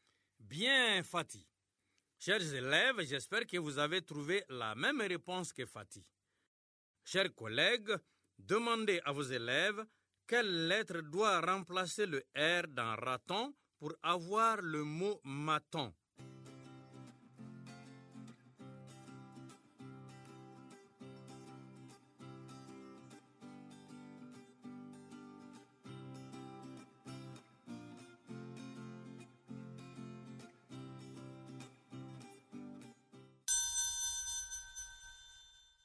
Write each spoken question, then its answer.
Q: Chers collègues, demandez à vos élèves quelle lettre doit remplacer le R dans raton pour avoir le mot maton.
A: Dans raton, on remplace R par M pour avoir maton.